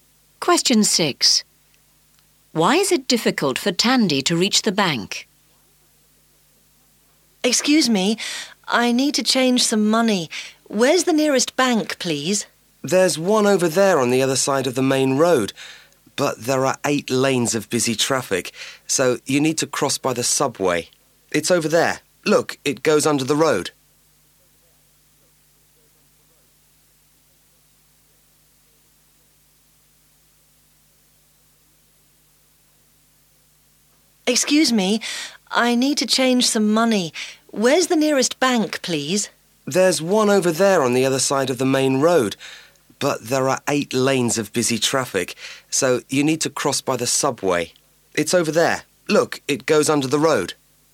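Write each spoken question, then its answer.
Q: Why is it difficult for Tandy to reach the bank?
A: There are 8 lanes of busy traffic, so she must use the subway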